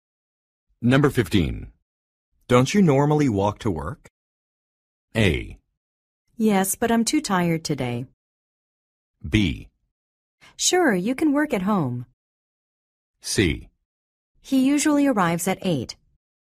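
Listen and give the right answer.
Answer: A: Yes, but I'm too tired today.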